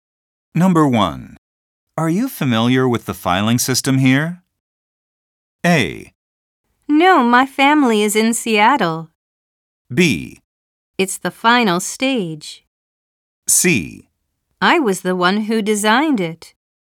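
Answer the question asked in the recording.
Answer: C: I was the one who designed it.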